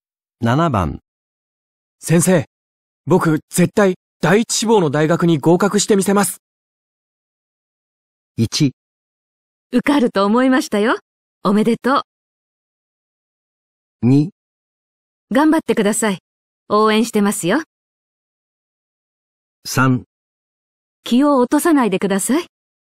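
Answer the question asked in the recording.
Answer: 2: 頑張ってください。応援してますよ。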